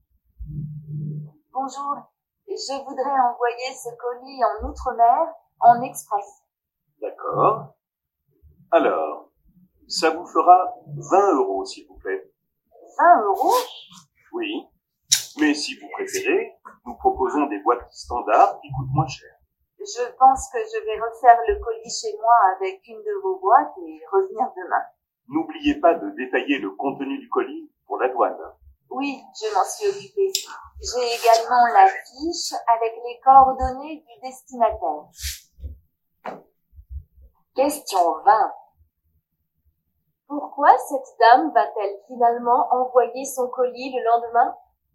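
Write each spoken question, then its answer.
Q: Pourquoi cette dame va-t-elle finalement envoyer son colis le lendemain?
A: Pour utiliser une boîte standard moins chère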